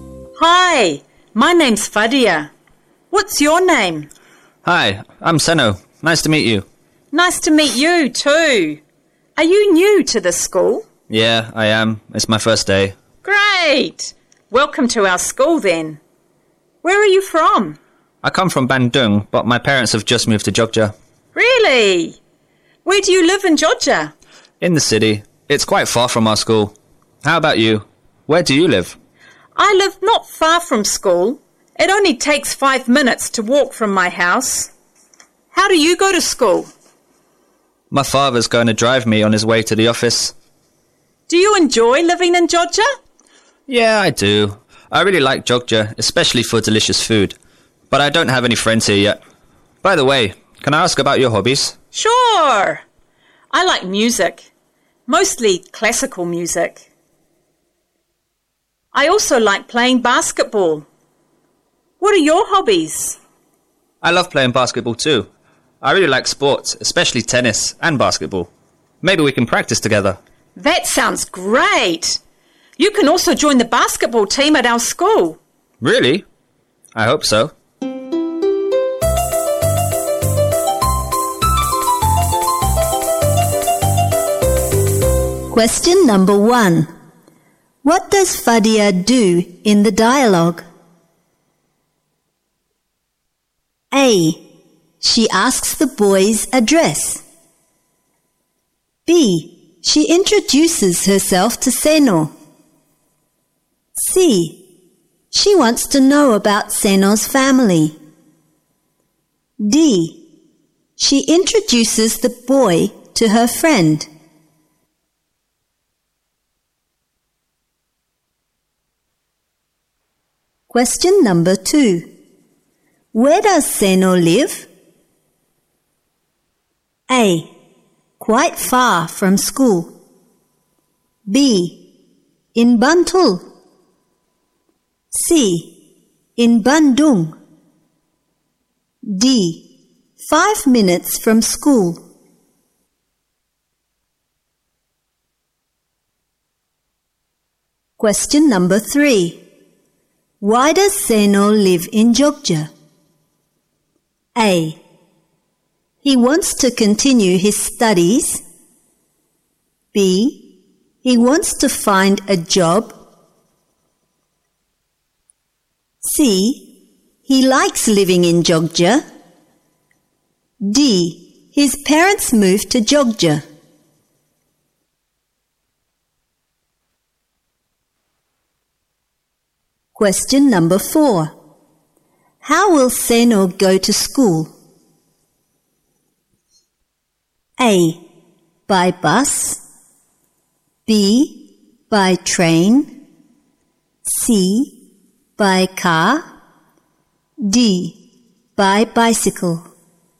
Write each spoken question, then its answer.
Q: What does Fadia do in the dialogue?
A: B. She introduces herself to Seno.

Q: Where does Senno live?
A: A. Quite far from school.

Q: Why does Senno live in Jogja?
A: D. Ya, benar. D.

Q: How will Senno go to school?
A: C. By car.